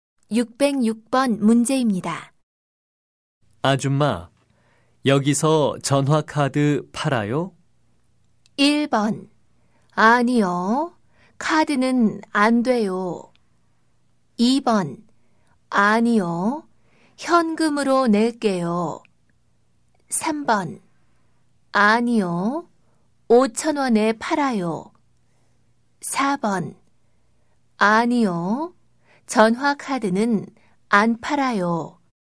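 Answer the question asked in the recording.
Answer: 4: 아니요. 전화카드는 안 팔아요.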